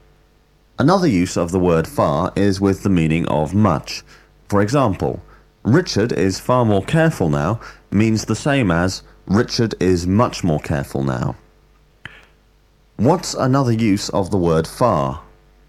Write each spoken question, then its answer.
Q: What's another use of the word far?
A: Another use of the word far is with the meaning of much.